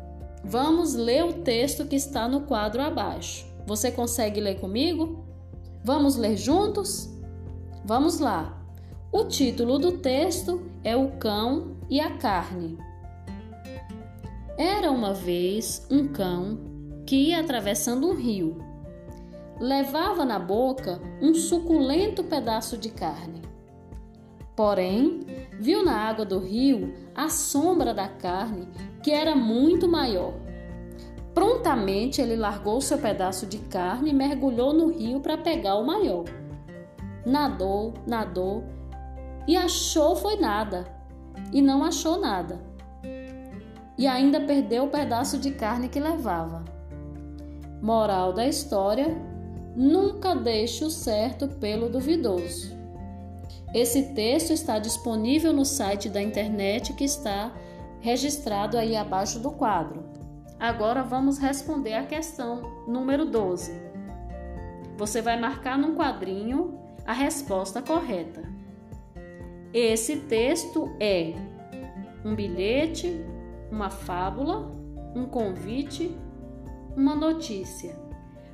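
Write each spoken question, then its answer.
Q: Esse texto é um bilhete, uma fábula, um convite, uma notícia.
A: B: uma fábula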